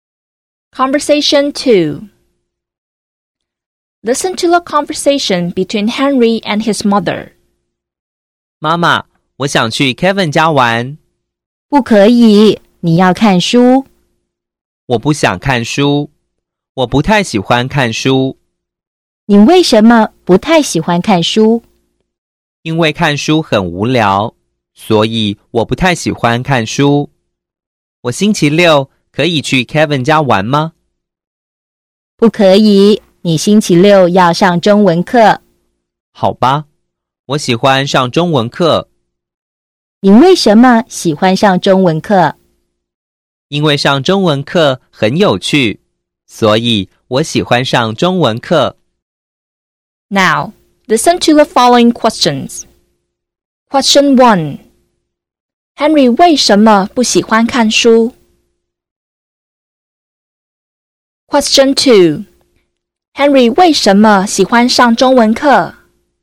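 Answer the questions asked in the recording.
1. 因为看书很无聊
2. 因为上中文课很有趣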